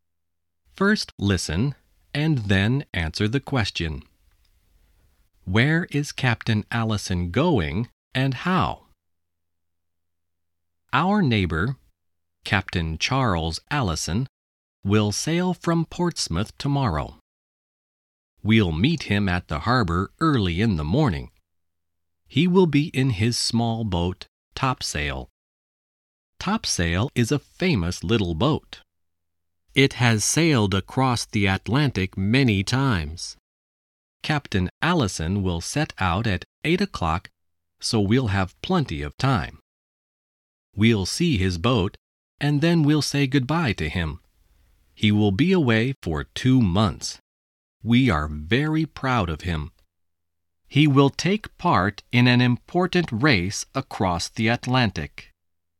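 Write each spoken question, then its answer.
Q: Where is Captain Allison going and how?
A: He is sailing across the Atlantic, in a race, in his small boat Topsail.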